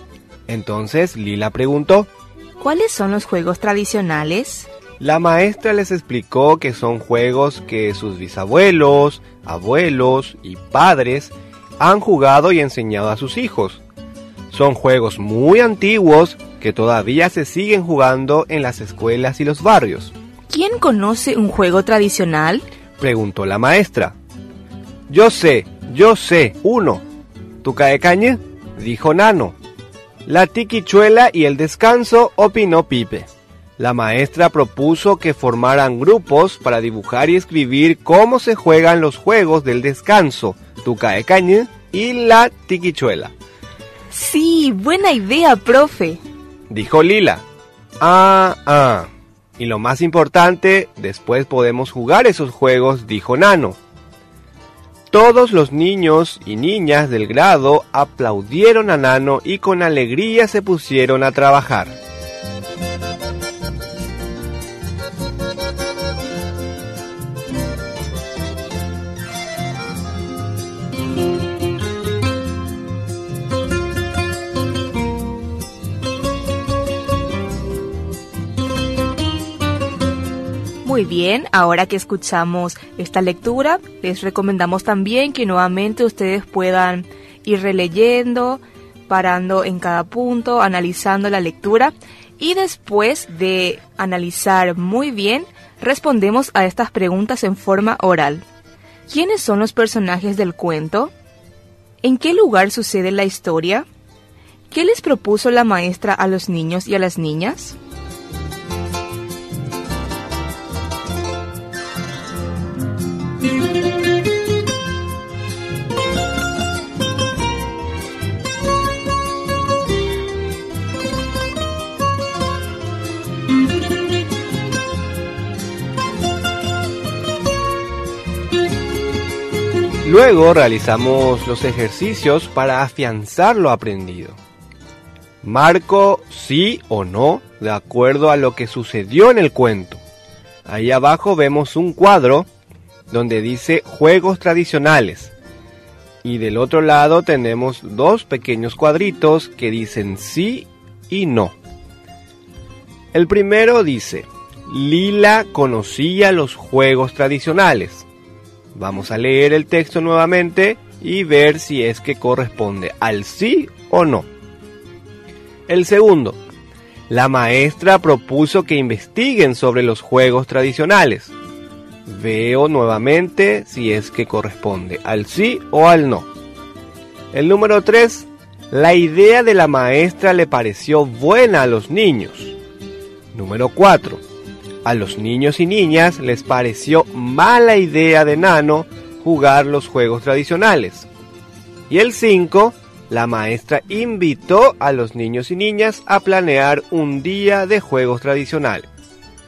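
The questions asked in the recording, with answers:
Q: ¿Quiénes son los personajes del cuento?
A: Tenemos, por ejemplo, a Lila, la maestra, tenemos a Nano, a Pipe.

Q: ¿En qué lugar sucede la historia?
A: sucede dentro de un salón de clases

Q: ¿Qué les propuso la maestra a los niños y a las niñas?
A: Formar grupos para dibujar y escribir cómo se juegan los juegos tradicionales

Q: Lila conocía los juegos tradicionales.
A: No

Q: la idea de la maestra le pareció buena a los niños.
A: Sí

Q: A los niños y niñas les pareció mala idea de Nano jugar los juegos tradicionales.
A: No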